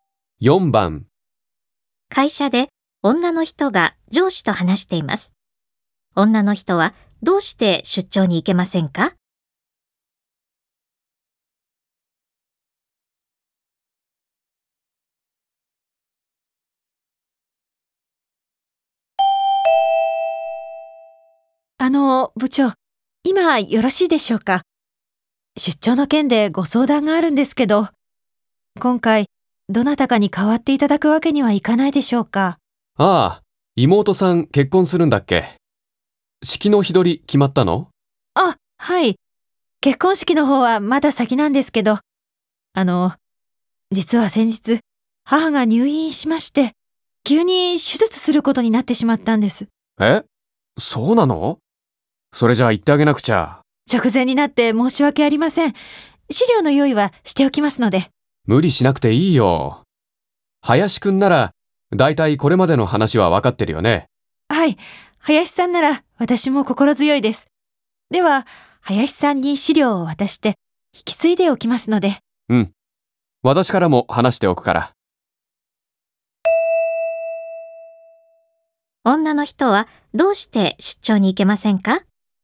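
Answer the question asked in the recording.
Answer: 母が入院して、急に手術することになったから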